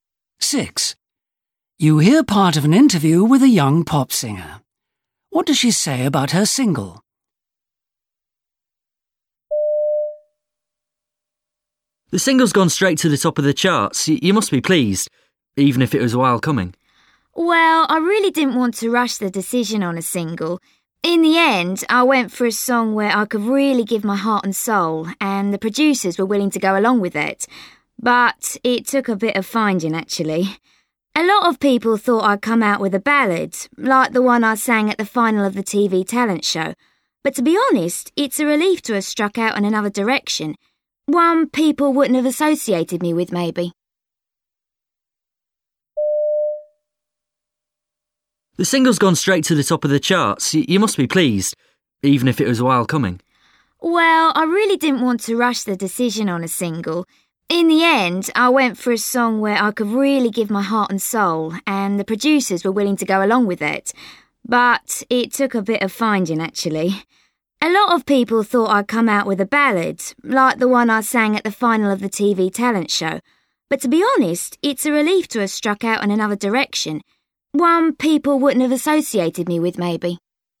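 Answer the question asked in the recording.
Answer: She is glad she chose a different kind of song from what people expected.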